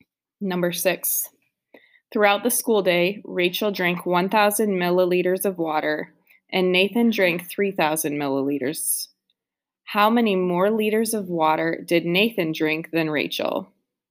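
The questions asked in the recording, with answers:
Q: How many more liters of water did Nathan drink than Rachel?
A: 2 liters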